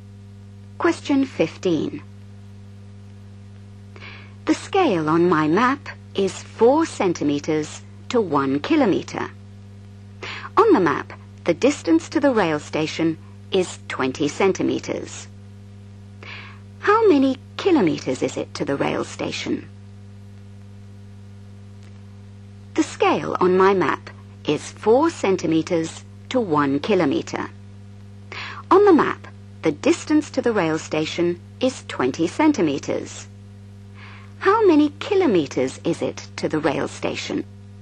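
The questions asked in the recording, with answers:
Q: How many kilometers is it to the rail station?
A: 5 km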